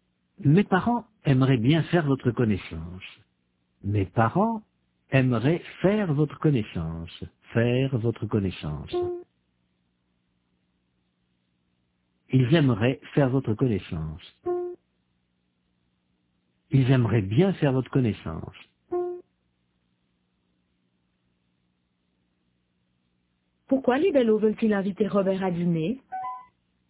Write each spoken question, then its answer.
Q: Pourquoi les Bellots veulent-ils inviter Robert à dîner ?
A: Parce qu'ils aimeraient bien faire sa connaissance.